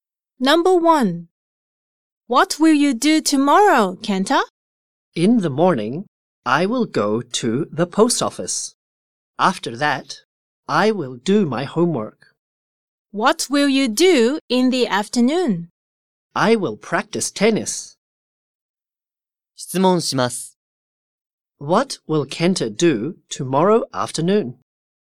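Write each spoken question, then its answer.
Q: What will Kenta do tomorrow afternoon?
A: He will practice tennis.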